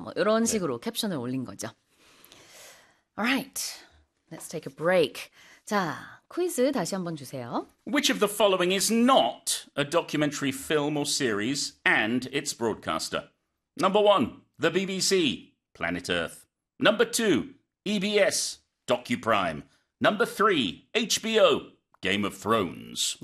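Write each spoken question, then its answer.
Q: Which of the following is not a documentary film or series and its broadcaster?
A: 3: HBO, Game of Thrones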